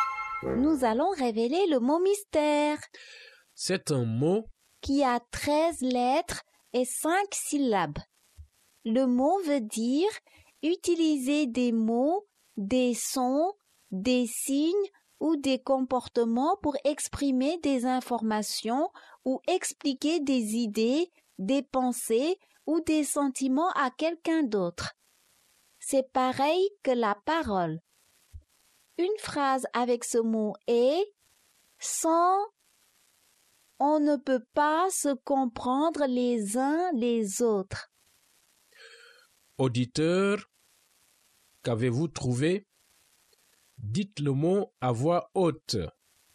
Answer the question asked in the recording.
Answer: Le mot mystère est communication.